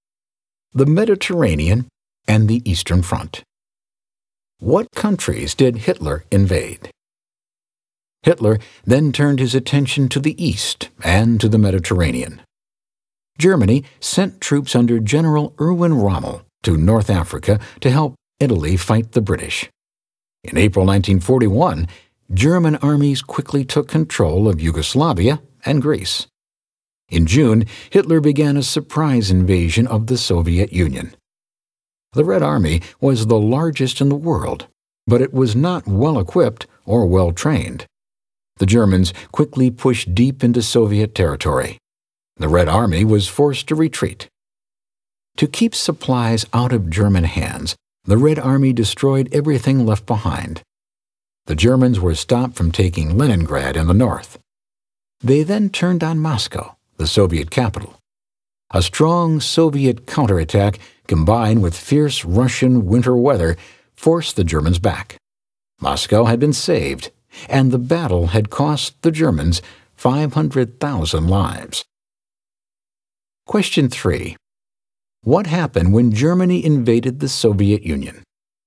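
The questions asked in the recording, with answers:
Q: What happened when Germany invaded the Soviet Union?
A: The Germans pushed deep into Soviet territory but were stopped at Leningrad and then driven back from Moscow by a Soviet counterattack and the winter, losing 500,000 lives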